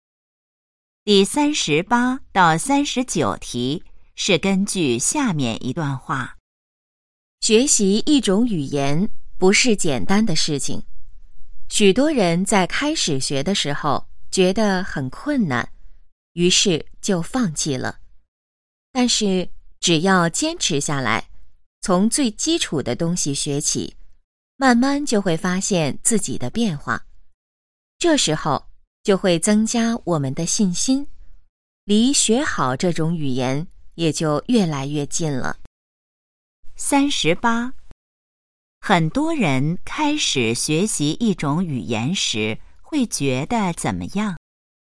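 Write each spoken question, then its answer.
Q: 很多人开始学习一种语言时会觉得怎么样?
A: 很困难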